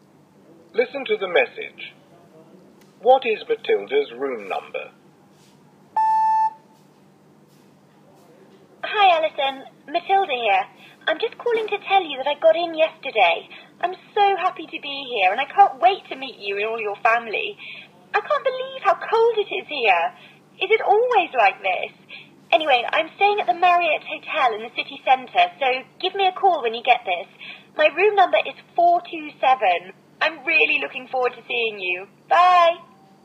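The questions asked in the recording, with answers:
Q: What is Matilda's room number?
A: 427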